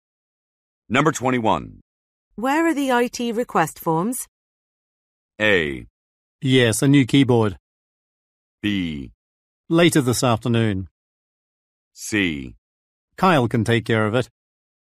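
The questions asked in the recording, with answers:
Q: Where are the IT request forms?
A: C: Kyle can take care of it.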